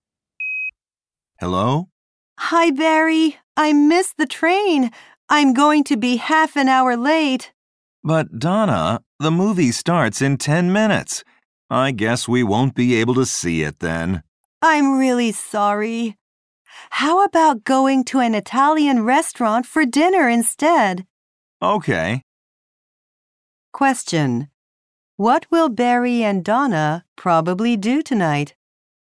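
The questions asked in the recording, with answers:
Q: What will Barry and Donna probably do tonight?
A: Go to an Italian restaurant for dinner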